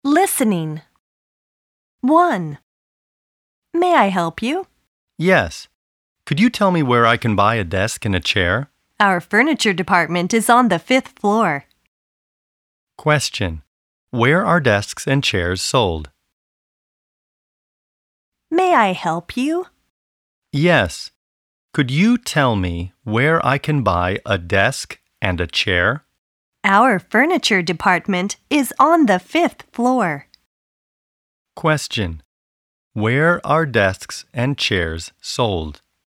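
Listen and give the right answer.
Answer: On the 5th floor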